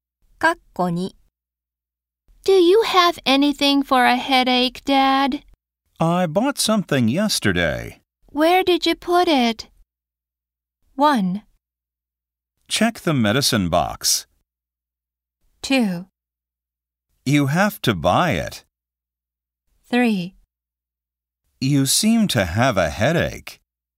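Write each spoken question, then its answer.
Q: Where did you put it?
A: 1: Check the medicine box.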